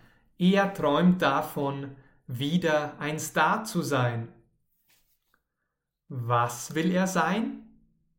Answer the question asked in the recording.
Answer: Ein Star. Er will ein Star sein.